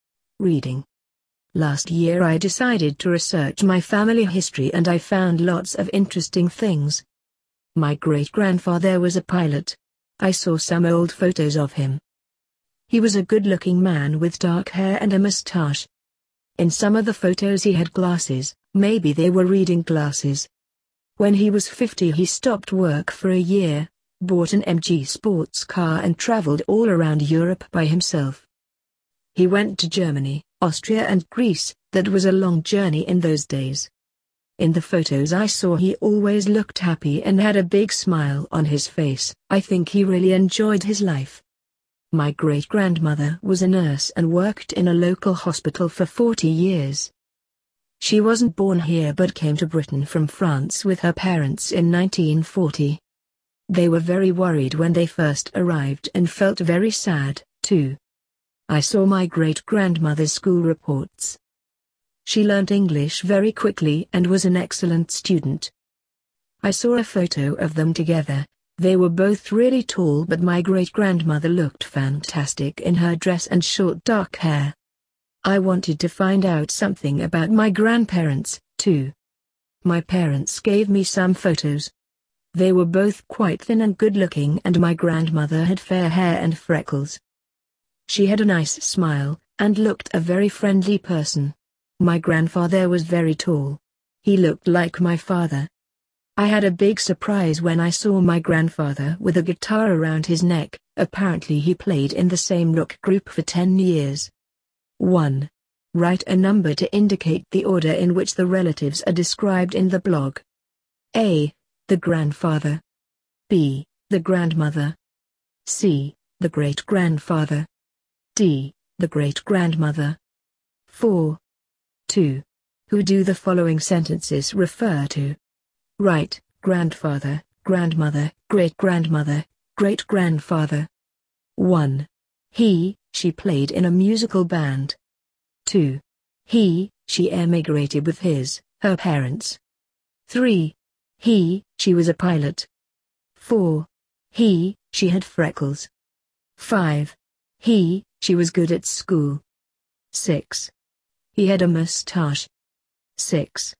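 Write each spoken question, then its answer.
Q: He, she played in a musical band.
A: grandfather

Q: He, she emigrated with his, her parents.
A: great-grandmother

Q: He, she was a pilot.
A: great-grandfather

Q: He, she had freckles.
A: grandmother

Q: He, she was good at school.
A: great-grandmother

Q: He had a mustache.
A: great-grandfather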